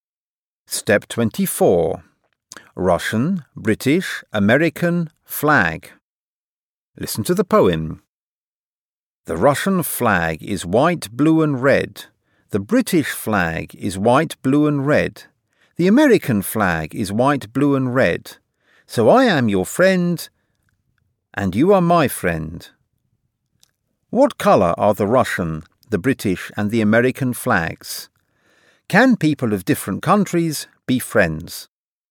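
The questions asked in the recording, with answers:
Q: What colour are the Russian, the British and the American flags?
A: White, blue and red

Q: Can people of different countries be friends?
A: Yes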